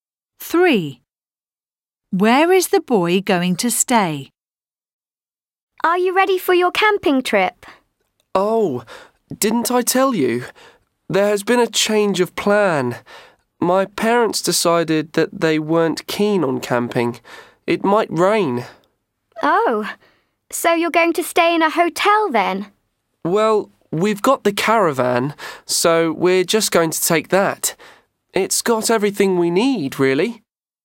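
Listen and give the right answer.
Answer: In a caravan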